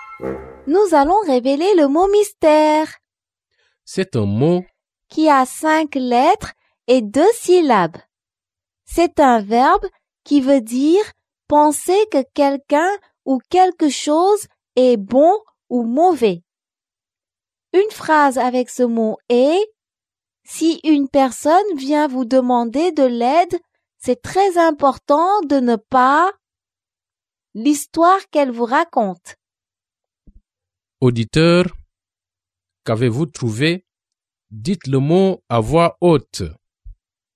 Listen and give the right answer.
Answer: Le mot mystère est juger.